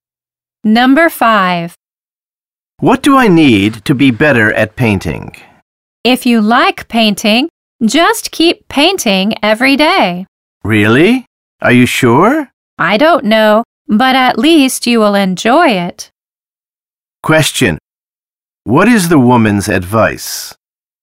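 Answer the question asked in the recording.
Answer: Keep painting every day.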